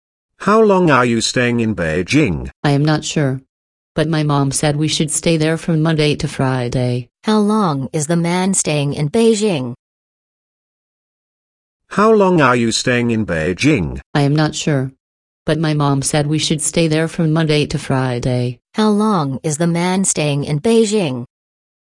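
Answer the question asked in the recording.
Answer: From Monday to Friday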